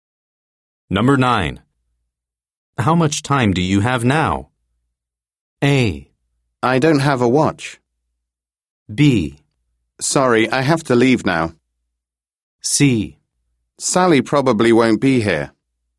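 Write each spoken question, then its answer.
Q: How much time do you have now?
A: B: Sorry, I have to leave now.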